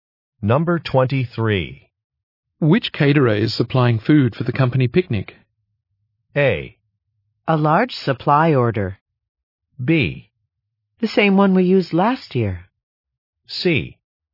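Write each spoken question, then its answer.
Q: Which caterer is supplying food for the company picnic?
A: B: The same one we used last year.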